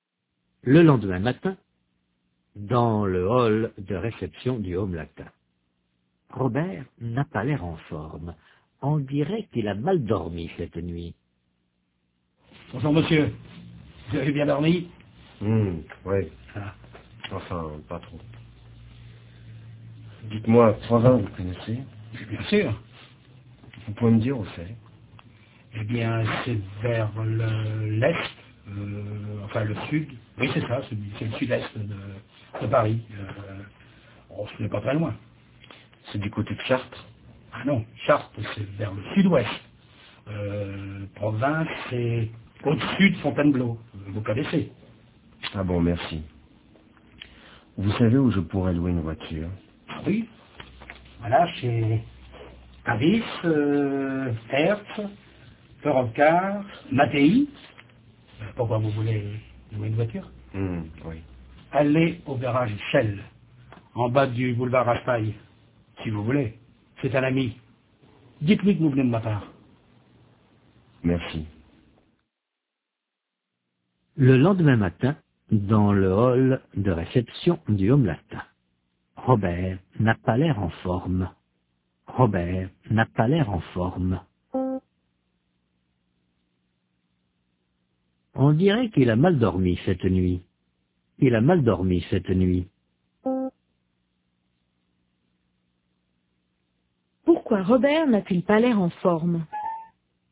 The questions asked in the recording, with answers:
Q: Pourquoi Robert n'a-t-il pas l'air en forme?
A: Parce qu'il a mal dormi.